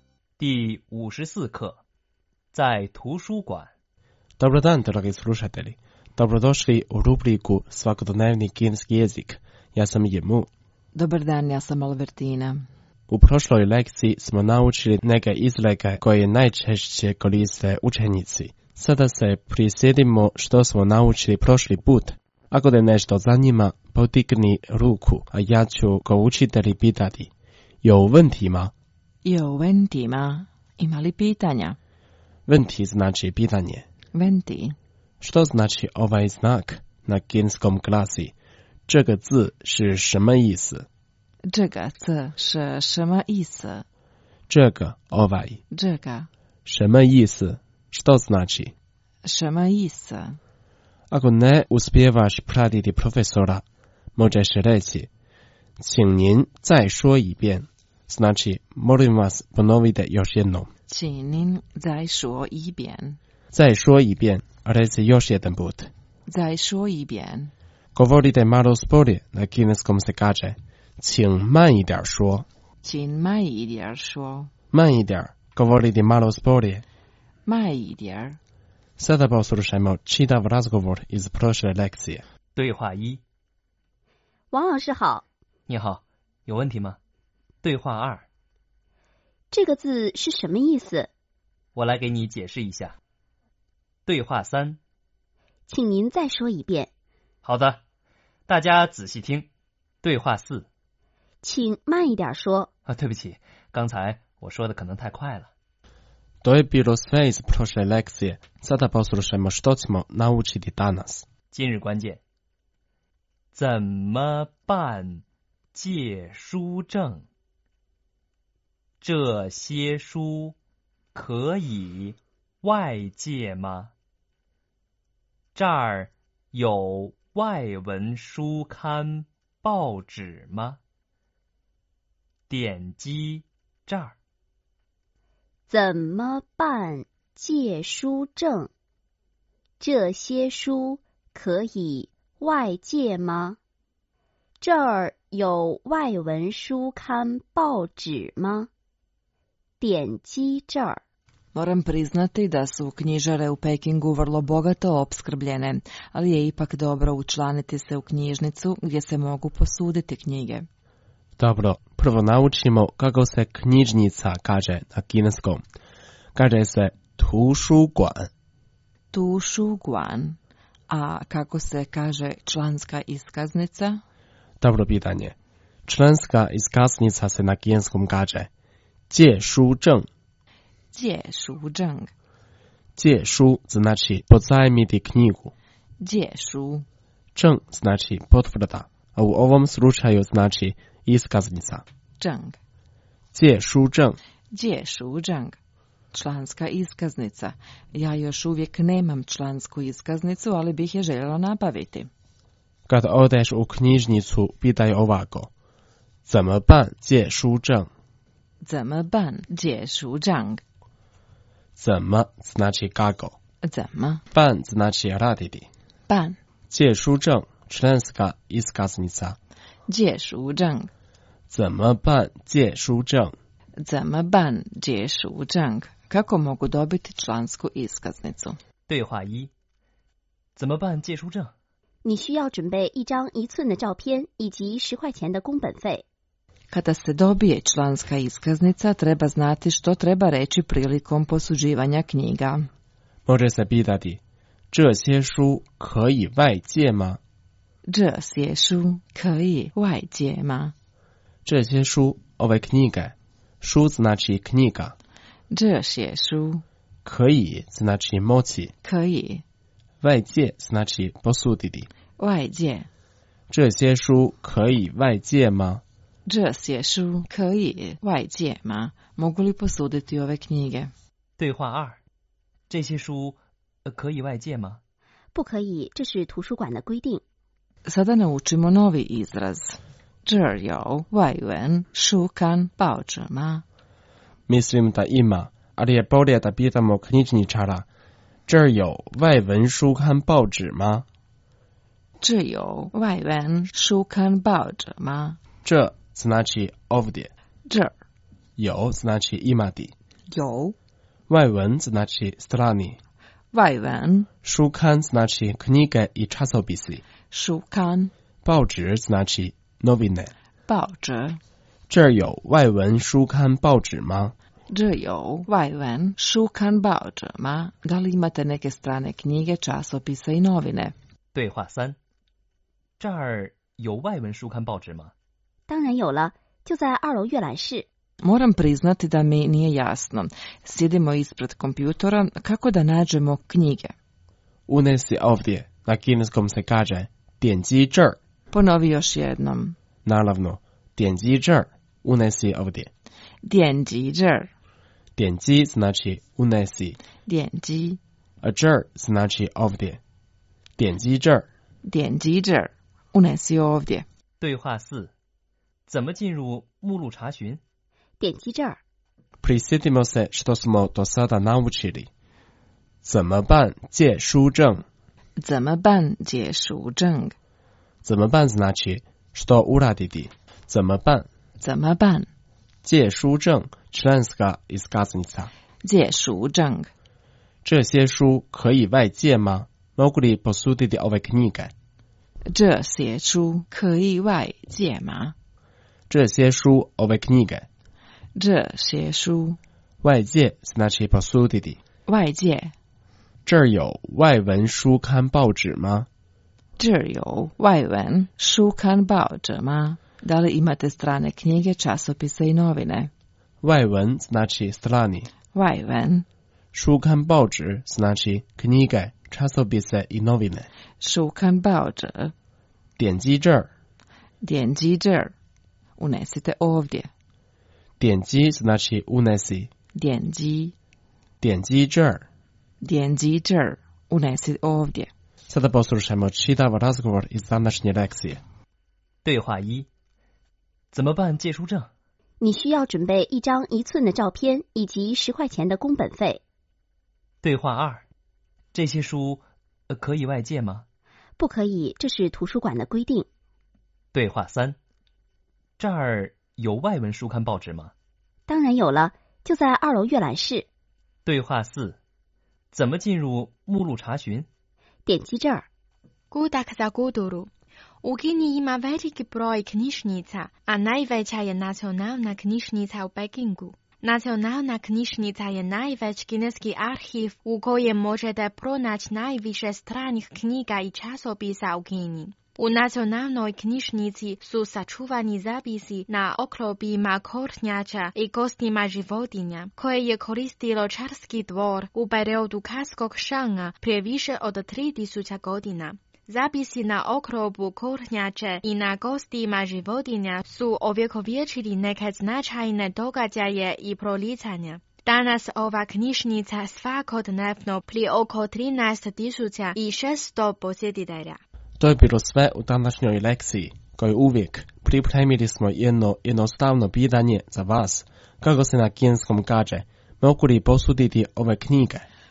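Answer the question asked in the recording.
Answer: 这些书可以外借吗?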